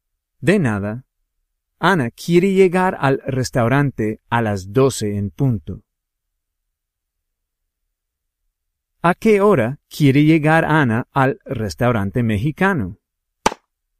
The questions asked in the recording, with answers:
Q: ¿A qué hora quiere llegar Ana al restaurante mexicano?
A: Ana quiere llegar al restaurante a las 12 en punto.